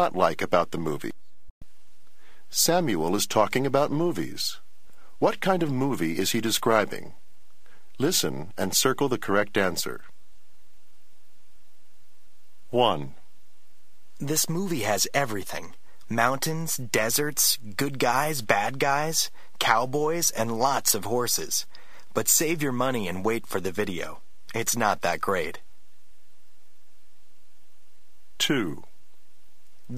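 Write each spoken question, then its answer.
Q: What kind of movie is he describing?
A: A western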